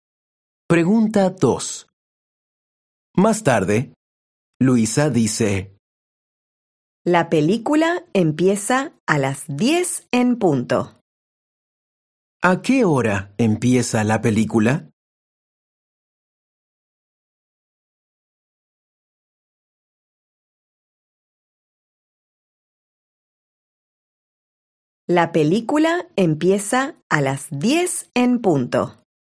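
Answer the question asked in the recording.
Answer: a las 10 en punto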